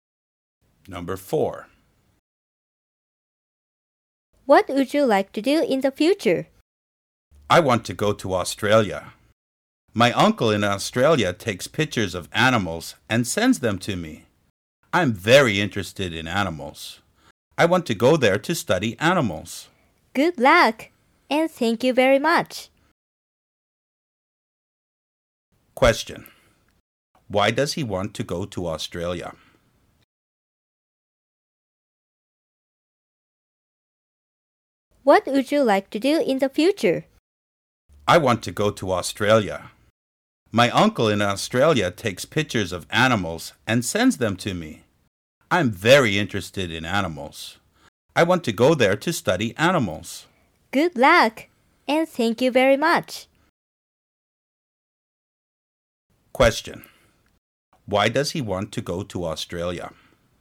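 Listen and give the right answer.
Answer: To study animals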